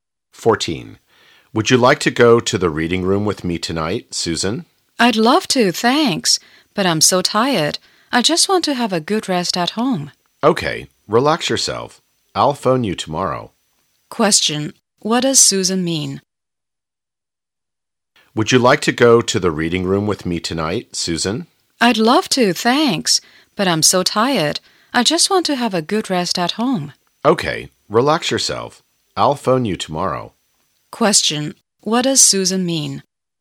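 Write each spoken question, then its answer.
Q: Question, what does Susan mean?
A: She won't go; she wants to rest at home because she is tired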